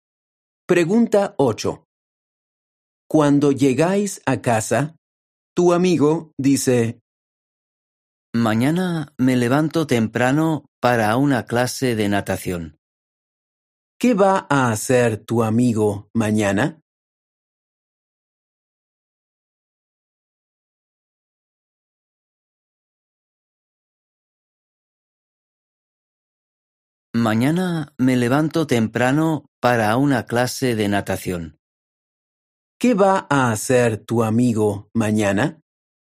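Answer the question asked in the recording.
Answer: Una clase de natación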